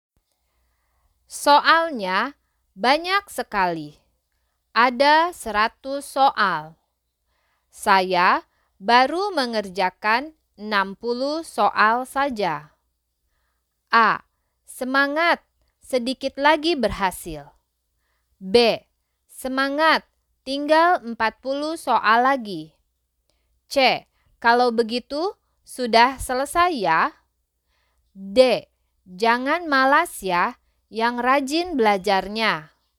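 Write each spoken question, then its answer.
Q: Saya baru mengerjakan 60 soal saja.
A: B: Semangat, tinggal 40 soal lagi.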